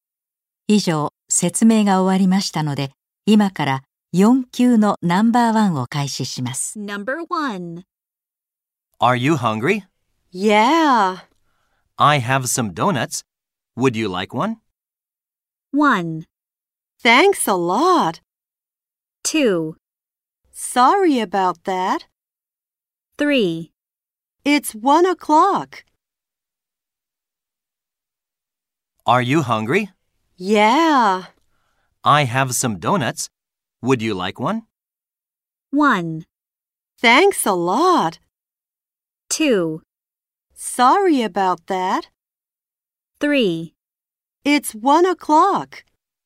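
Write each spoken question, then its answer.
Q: I have some donuts. Would you like one?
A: 1: Thanks a lot.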